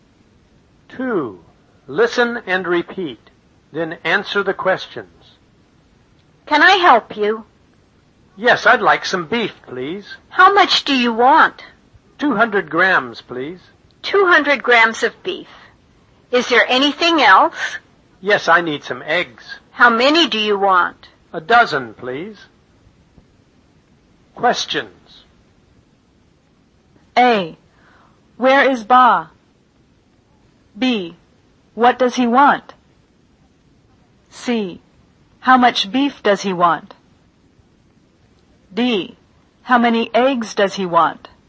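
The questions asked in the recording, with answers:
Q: What does he want?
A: Some beef and some eggs

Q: How much beef does he want?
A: 200 grams

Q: How many eggs does he want?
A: A dozen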